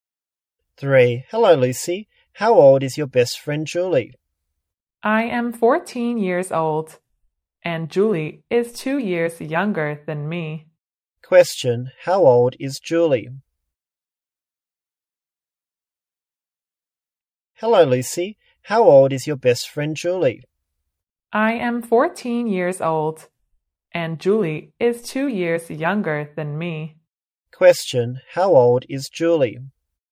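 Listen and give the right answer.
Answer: 12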